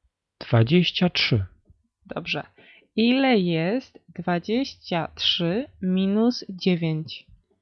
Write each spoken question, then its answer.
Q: Ile jest 23 minus 9?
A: Czternaście.